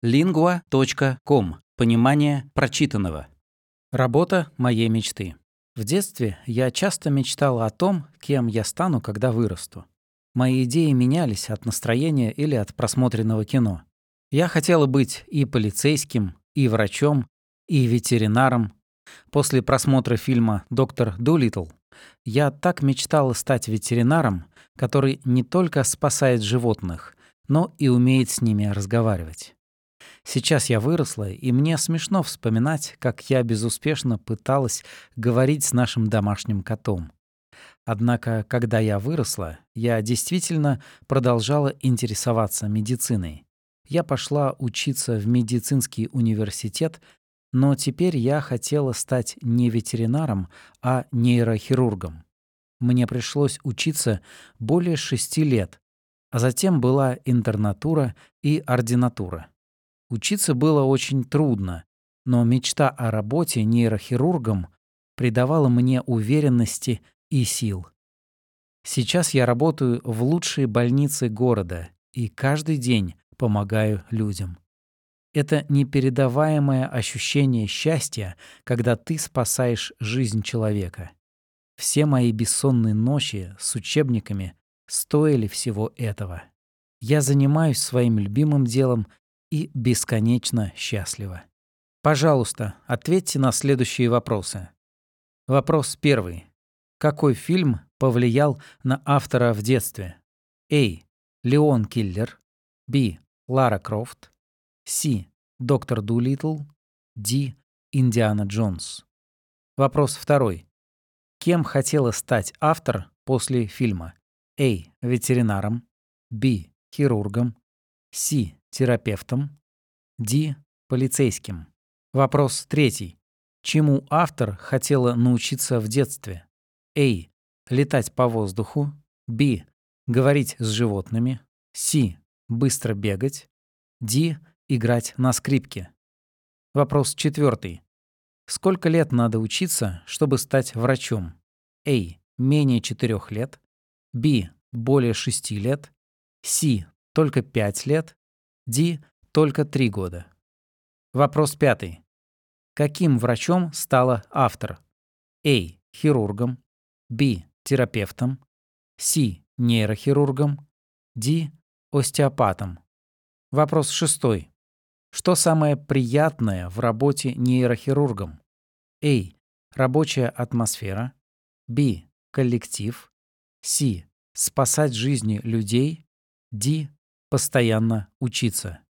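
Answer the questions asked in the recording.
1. C: Доктор Дулиттл
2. A: Ветеринаром
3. B: Говорить с животными
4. B: Более 6 лет
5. C: Нейрохирургом
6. C: Спасать жизни людей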